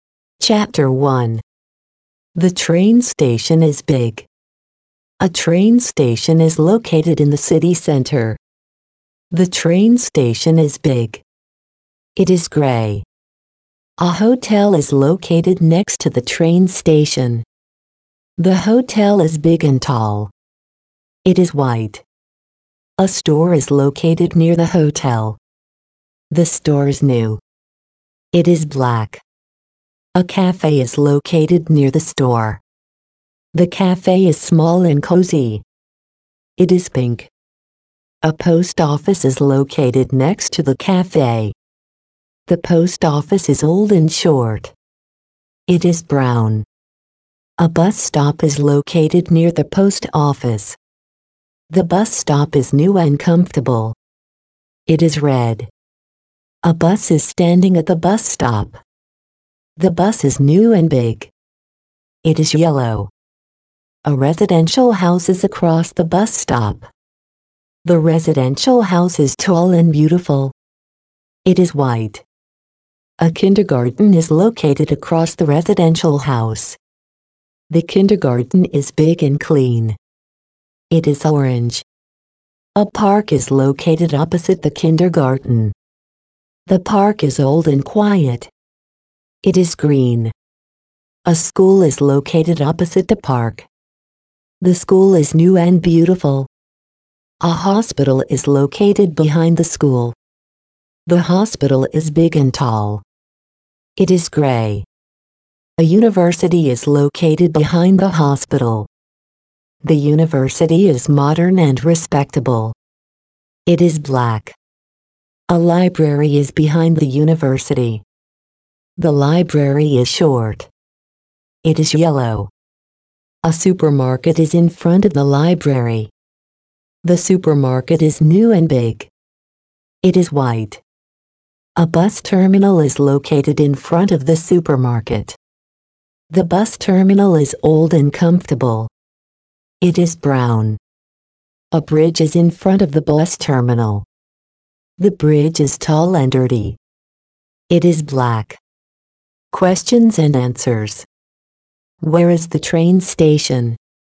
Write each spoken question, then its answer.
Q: Where is the train station?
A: It is in the city center.